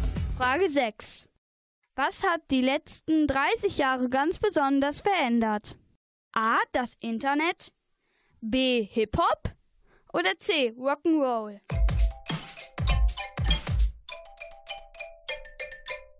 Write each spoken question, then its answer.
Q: Was hat die letzten 30 Jahre ganz besonders verändert?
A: Antwort A ist korrekt, das Internet.